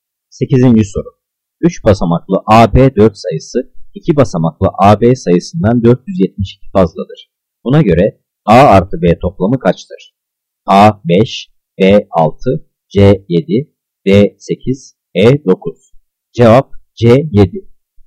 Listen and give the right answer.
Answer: Cevap C 7.